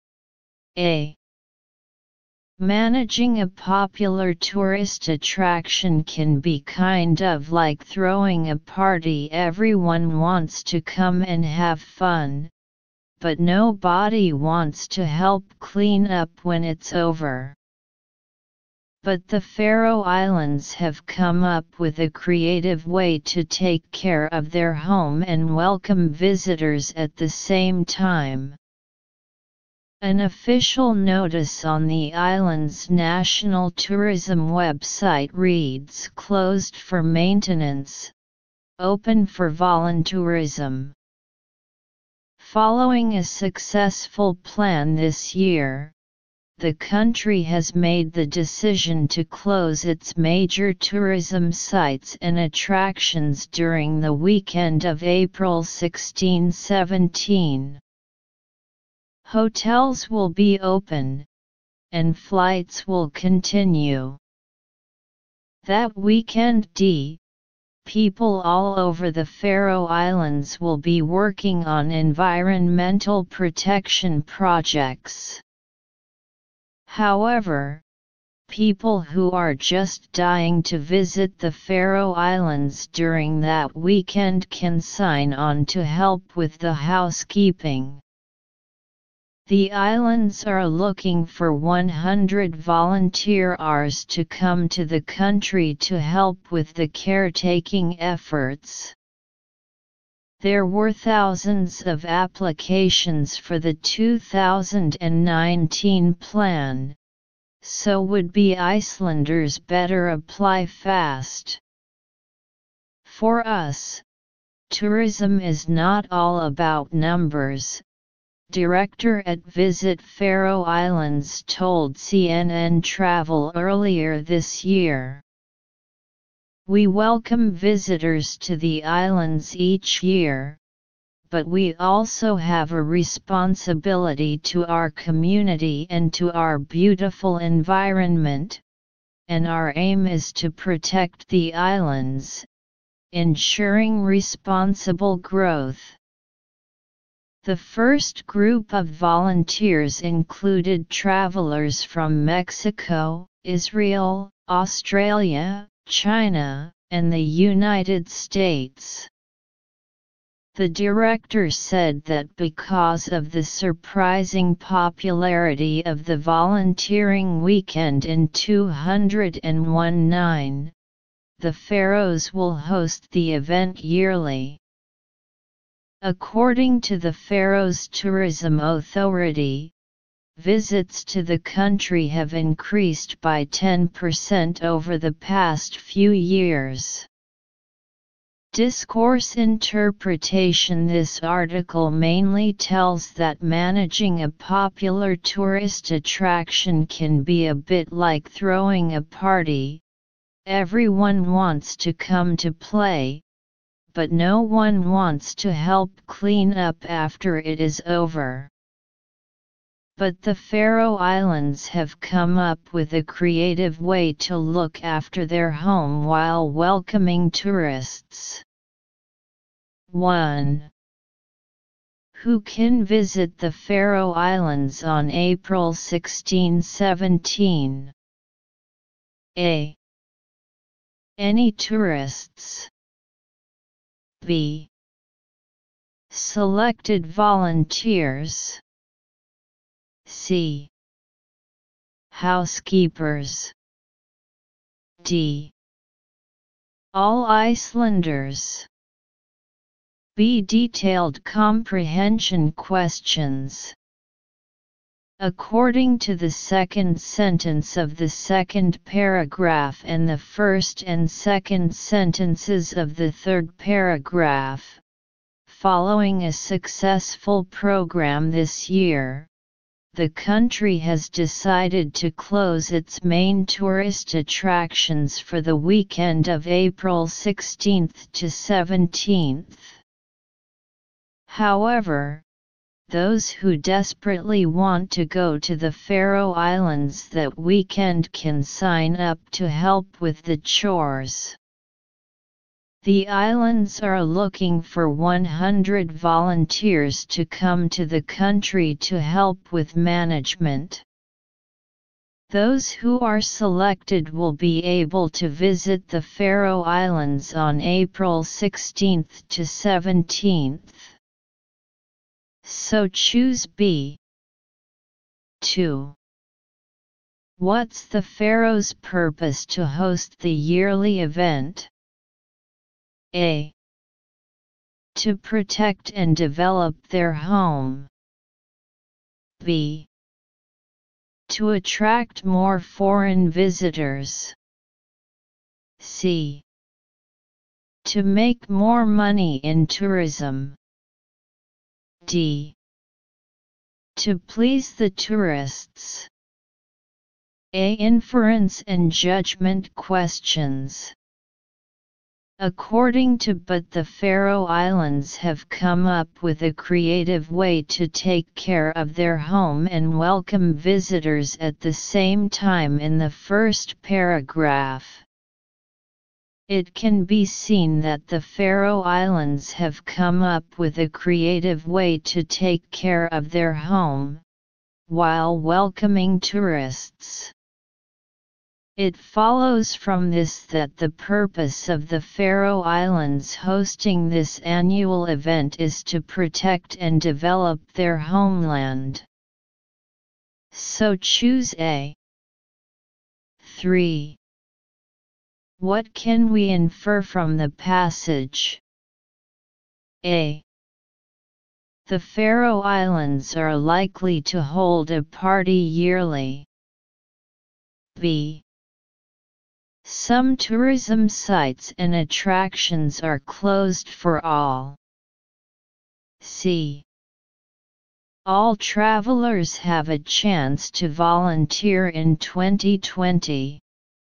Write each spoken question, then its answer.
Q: Who can visit the Faroe Islands on April 16-17?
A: So choose B.

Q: What's the Faroe's purpose to host the yearly event?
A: So choose A.